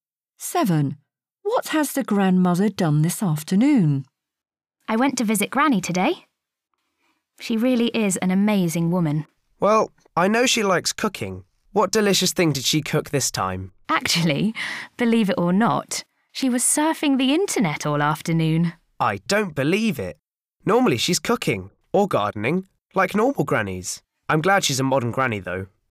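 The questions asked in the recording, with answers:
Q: What has the grandmother done this afternoon?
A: surfed the internet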